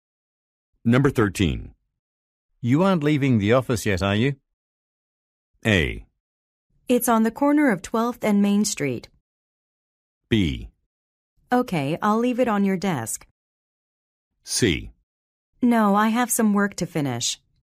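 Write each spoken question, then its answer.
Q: You aren't leaving the office yet, are you?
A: C: No, I have some work to finish.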